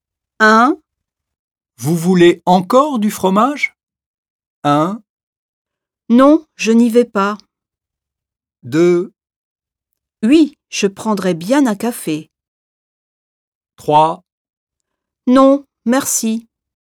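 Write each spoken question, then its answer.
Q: Vous voulez encore du fromage?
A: 3: Non, merci.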